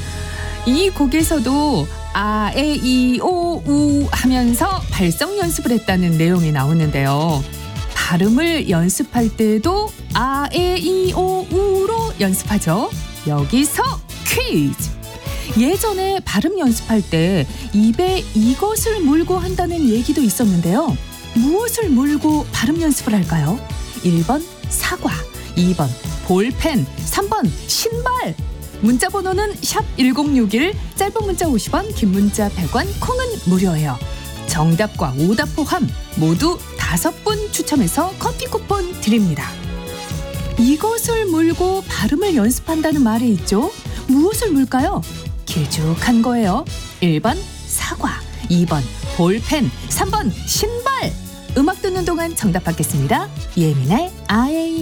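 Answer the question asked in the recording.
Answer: 2: 볼펜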